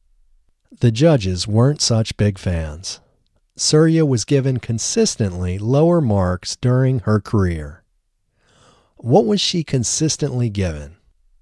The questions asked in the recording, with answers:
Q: What was she consistently given?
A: She was consistently given lower marks.